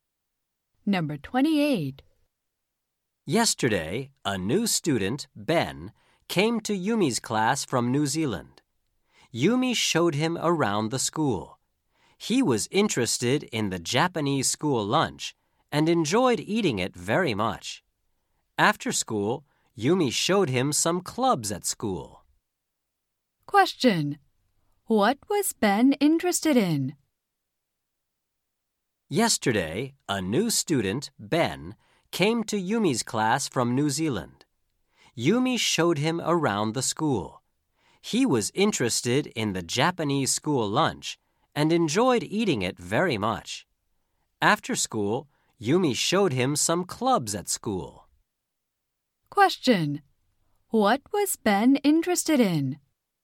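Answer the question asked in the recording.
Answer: The Japanese school lunch.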